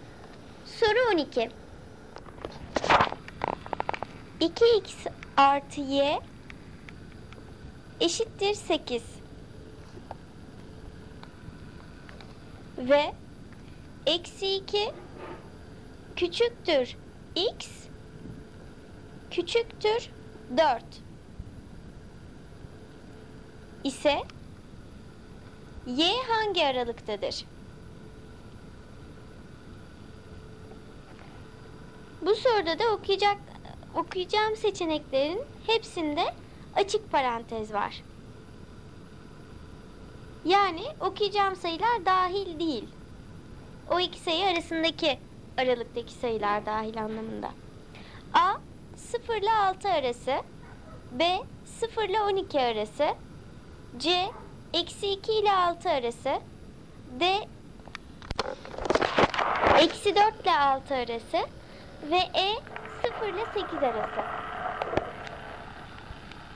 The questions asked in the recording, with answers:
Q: ise y hangi aralıktadır?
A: Doğru cevap B 0 ile 12 arası.